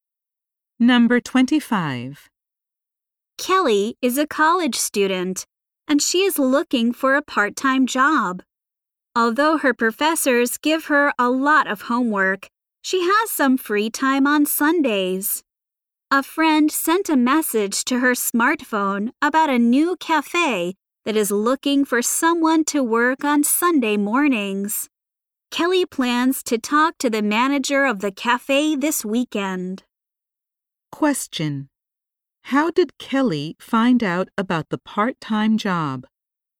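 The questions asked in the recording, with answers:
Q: How did Kelly find out about the part-time job?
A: A friend sent a message to her smartphone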